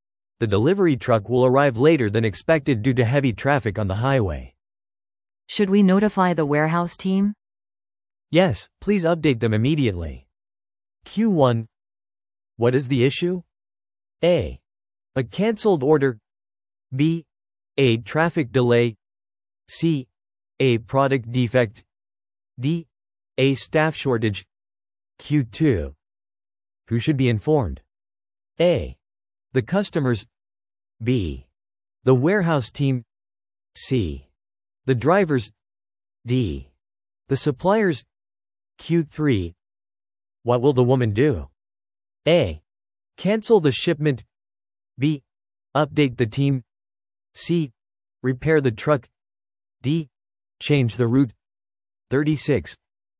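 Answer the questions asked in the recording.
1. B: A traffic delay.
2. B: The warehouse team.
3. B: Update the team.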